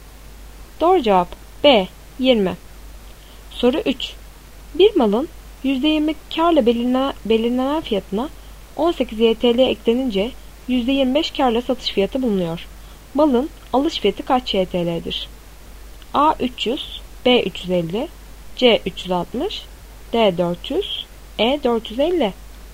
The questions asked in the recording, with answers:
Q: Malın alış fiyatı kaç YTL'dir?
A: Doğru cevap C 360.